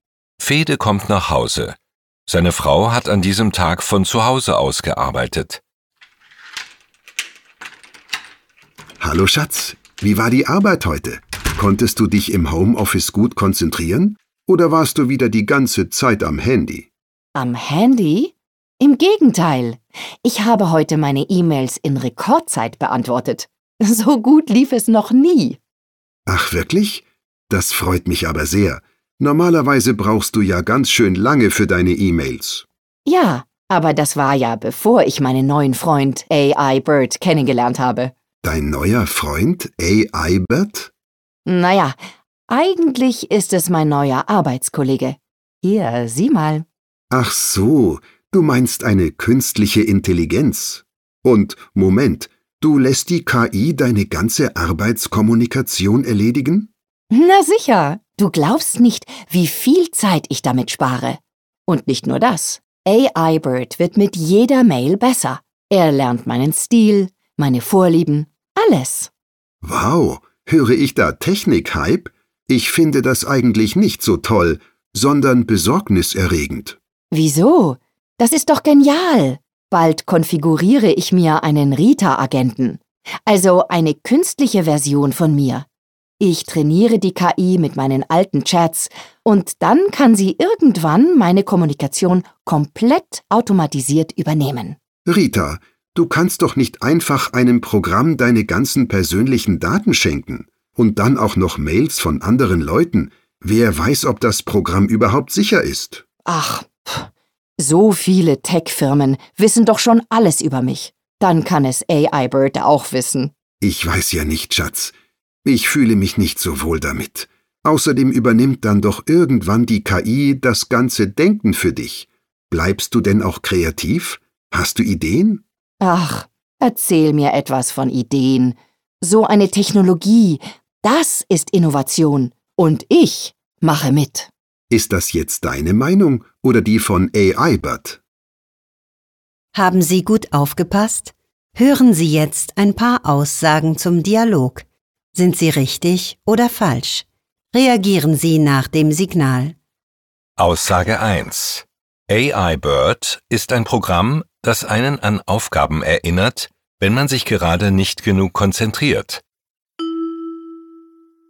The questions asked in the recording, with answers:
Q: AI Bird ist ein Programm, das einen an Aufgaben erinnert, wenn man sich gerade nicht genug konzentriert.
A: Falsch. AI Bird erledigt Schreibaufgaben.